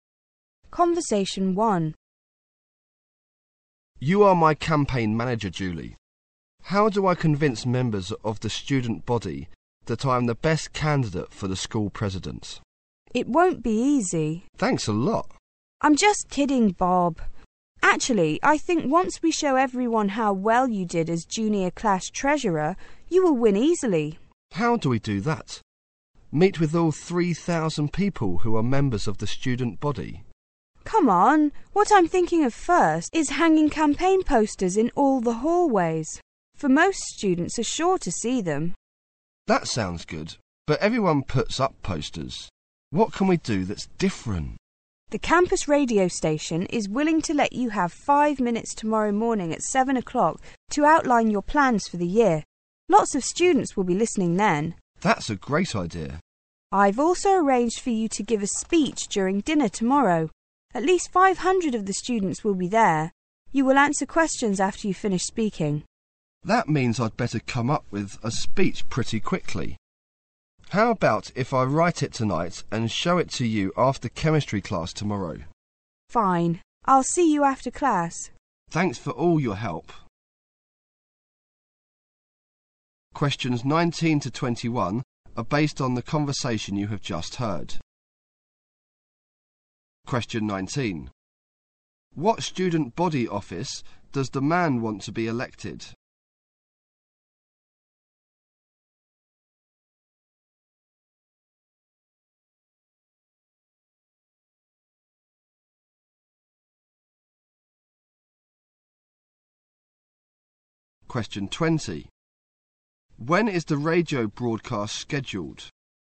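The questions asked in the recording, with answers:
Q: What student body office does the man want to be elected?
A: School president

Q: When is the radio broadcast scheduled?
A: Tomorrow morning at 7 o'clock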